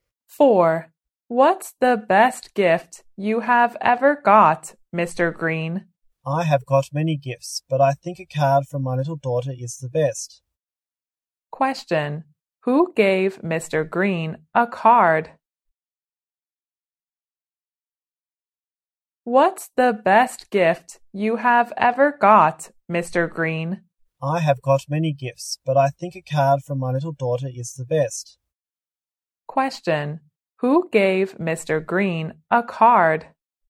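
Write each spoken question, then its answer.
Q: Who gave Mr. Green a card?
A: His little daughter.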